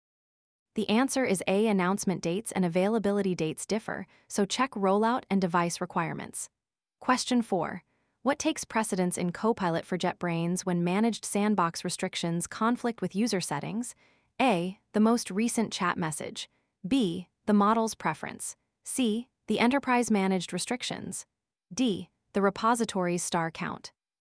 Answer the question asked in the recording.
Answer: The answer is C.